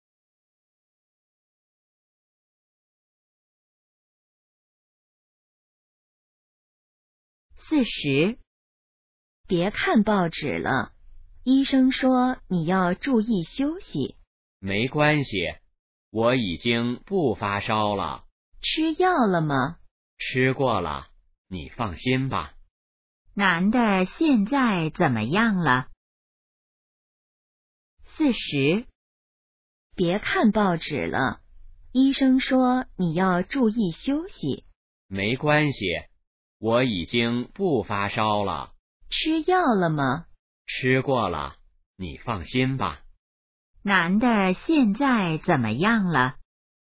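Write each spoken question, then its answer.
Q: 男的现在怎么样了?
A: 已经不发烧了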